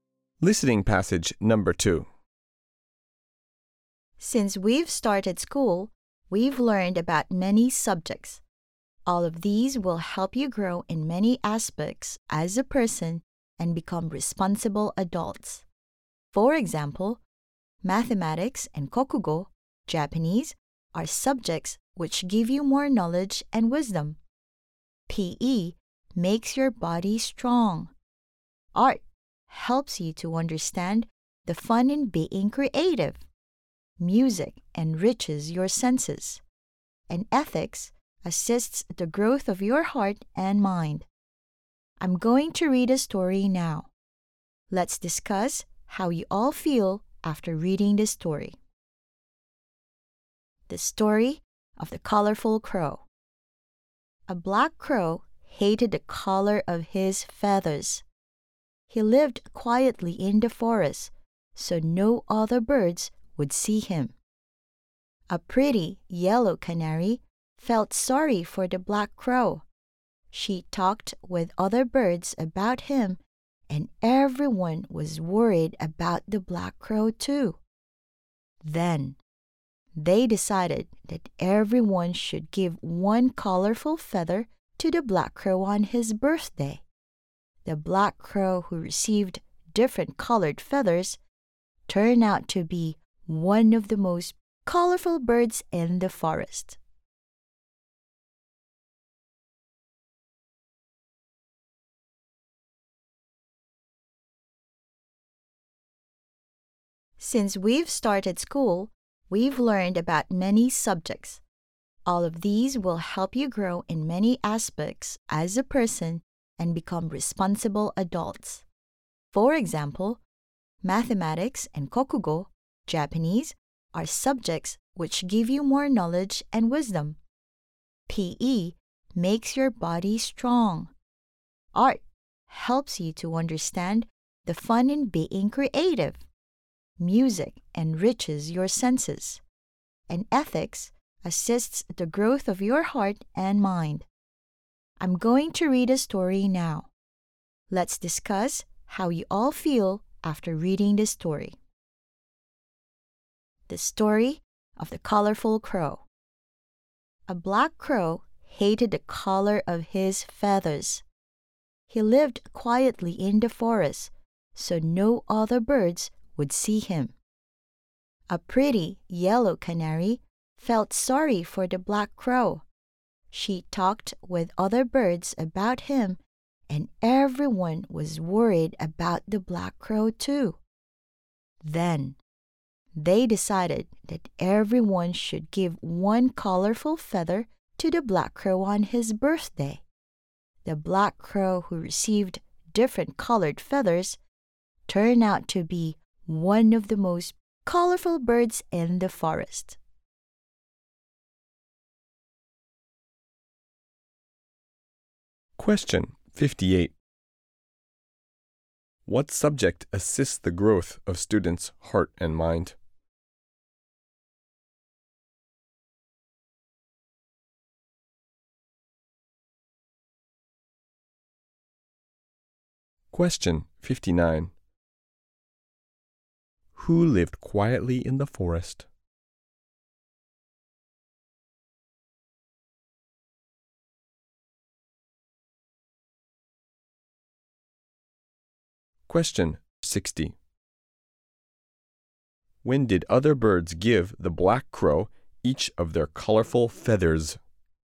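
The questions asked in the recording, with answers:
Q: What subject assists the growth of students' heart and mind?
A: Ethics

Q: Who lived quietly in the forest?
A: A black crow

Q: When did other birds give the black crow each of their colorful feathers?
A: On his birthday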